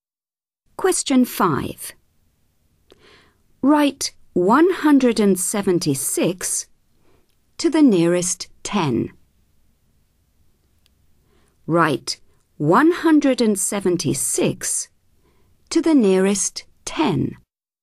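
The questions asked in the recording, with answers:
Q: Write 176 to the nearest 10.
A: 180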